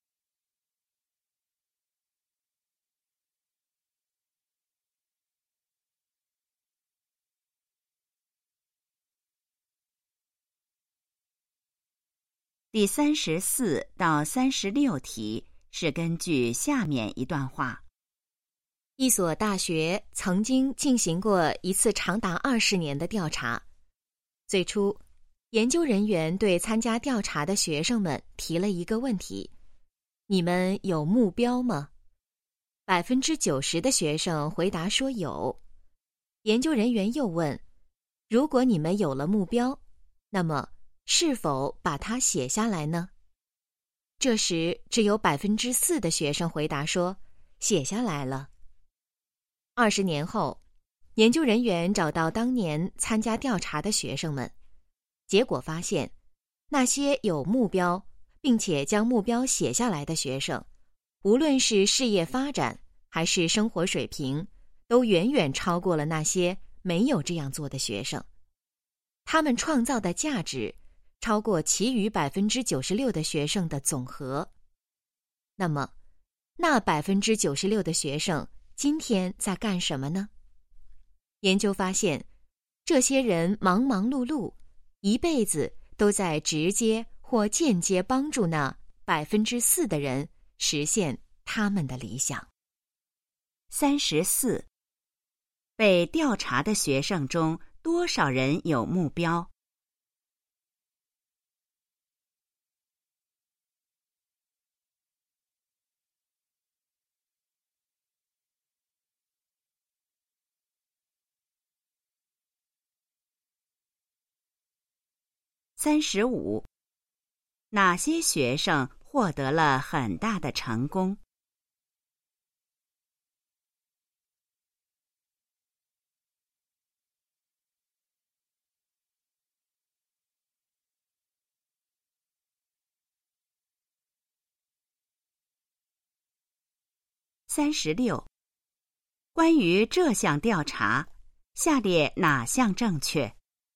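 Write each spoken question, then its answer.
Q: 被调查的学生中多少人有目标?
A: 90%

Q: 哪些学生获得了很大的成功?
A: 有目标并且把目标写下来的学生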